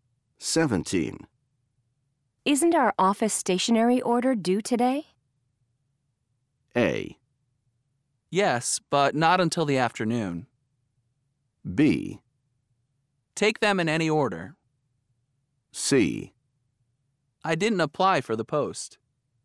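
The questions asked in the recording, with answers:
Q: Isn't our office stationery order due today?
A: A: Yes, but not until the afternoon.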